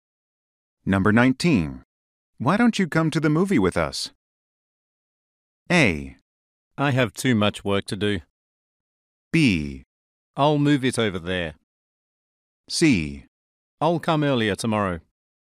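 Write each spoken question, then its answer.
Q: Why don't you come to the movie with us?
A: A: I have too much work to do.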